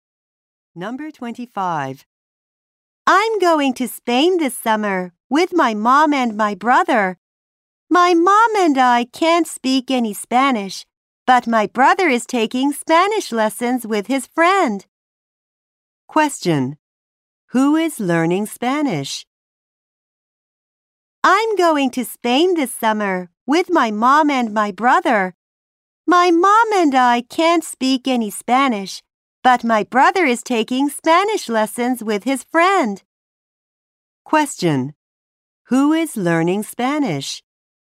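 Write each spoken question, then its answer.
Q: Who is learning Spanish?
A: The boy's brother.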